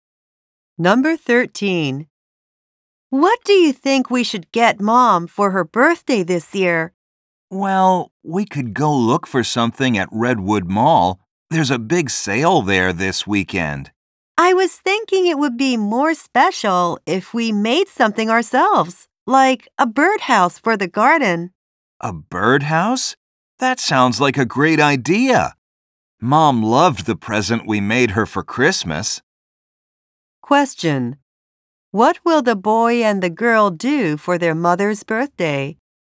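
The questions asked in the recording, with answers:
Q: What will the boy and the girl do for their mother's birthday?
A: Make her a birdhouse.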